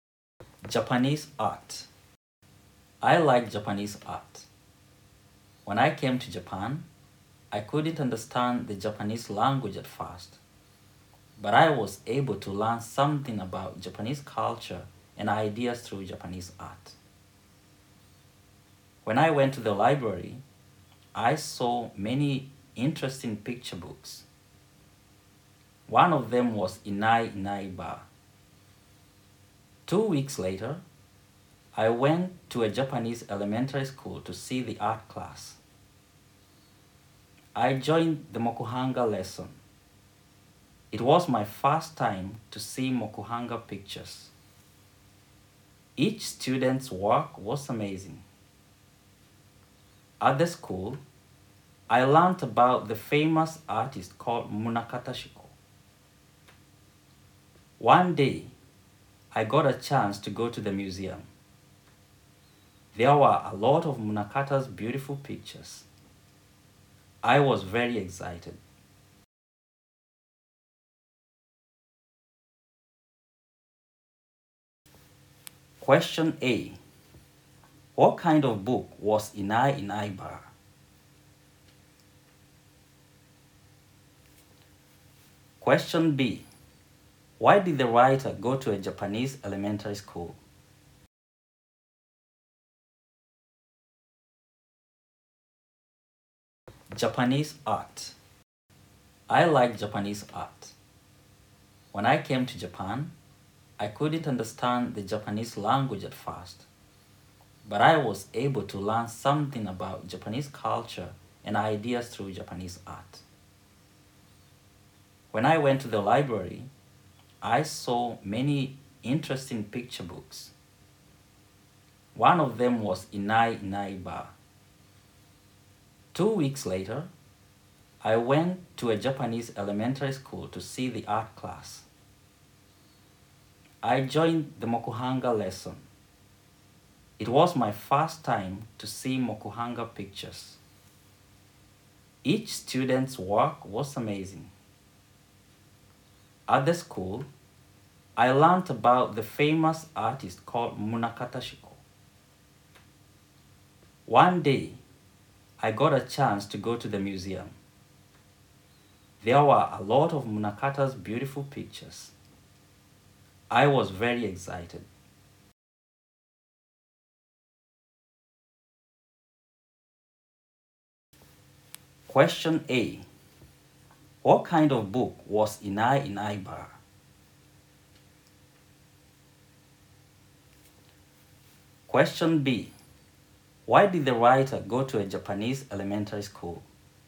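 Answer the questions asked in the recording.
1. It was a picture book.
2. To see the art class.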